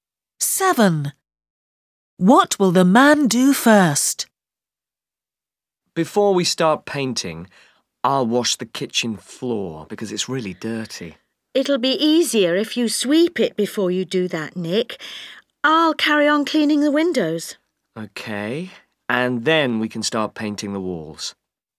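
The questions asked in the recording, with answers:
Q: Seven. What will the man do first?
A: sweep the kitchen floor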